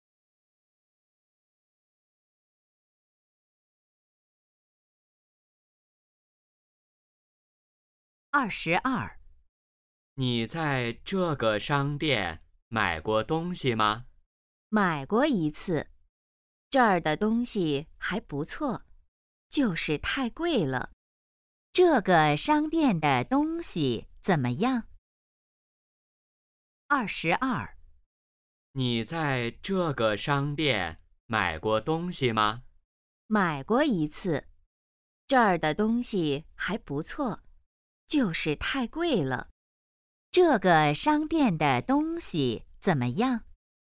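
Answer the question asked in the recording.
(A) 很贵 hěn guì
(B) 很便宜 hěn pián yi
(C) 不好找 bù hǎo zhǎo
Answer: (A) 很贵 hěn guì

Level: HSK2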